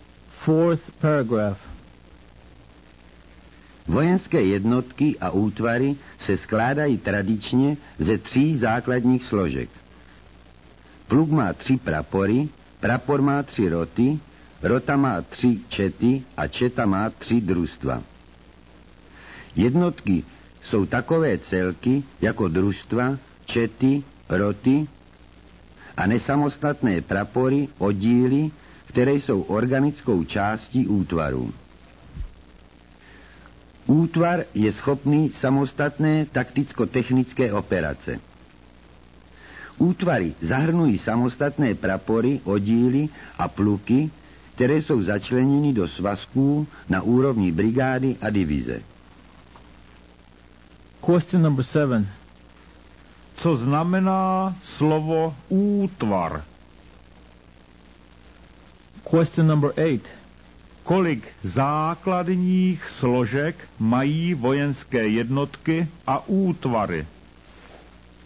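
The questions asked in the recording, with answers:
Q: Co znamená slovo útvar?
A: celek schopný samostatné takticko-technické operace

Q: Kolik základních složek mají vojenské jednotky a útvary?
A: tři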